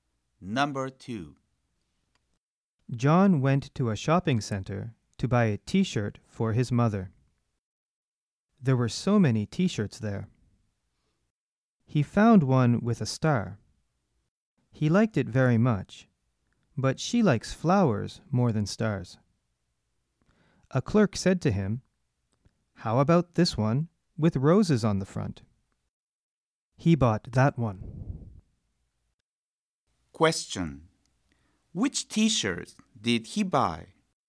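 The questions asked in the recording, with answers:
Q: Which t-shirt did he buy?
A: The one with roses on the front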